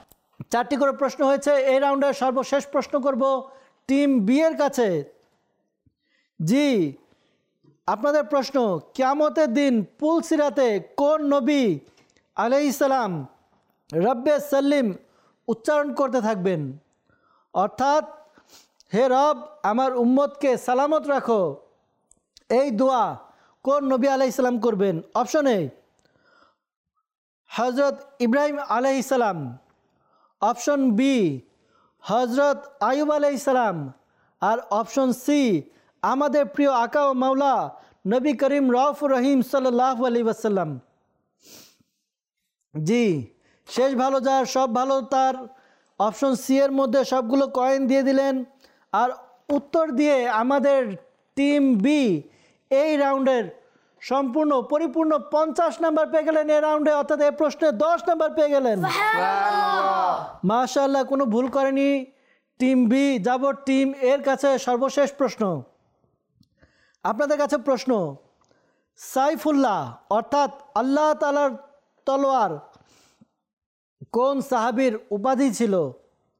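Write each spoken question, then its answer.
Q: কিয়ামতের দিন পুল সিরাতে কোন নবী আলাইহিসসালাম রব্বে সাল্লিম উচ্চারণ করতে থাকবেন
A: C: নবী করিম সাল্লাল্লাহু আলাইহি ওয়াসাল্লাম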